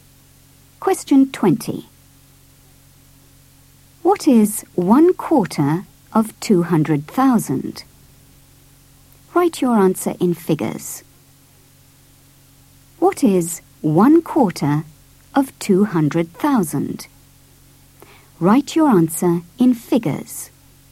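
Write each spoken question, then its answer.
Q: What is 1/4 of 200,000?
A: 50000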